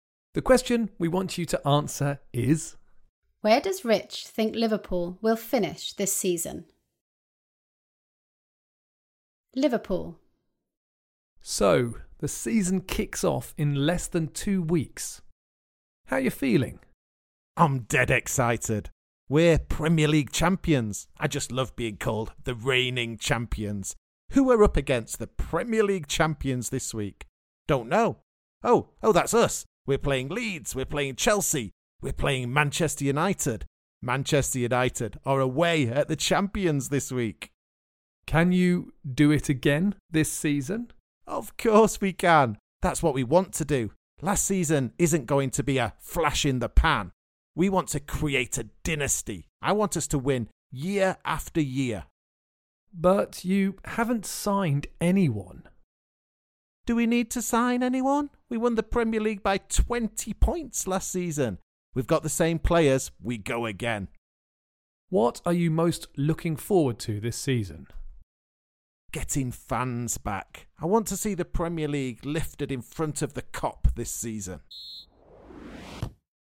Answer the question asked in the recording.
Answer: he thinks Liverpool will win the Premier League again.